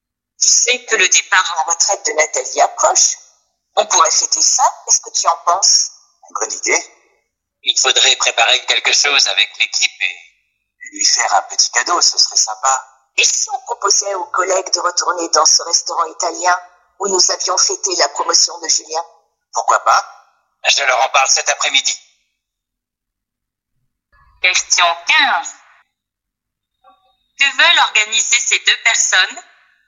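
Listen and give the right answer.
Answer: Une fête (un repas au restaurant italien) pour le départ à la retraite de Nathalie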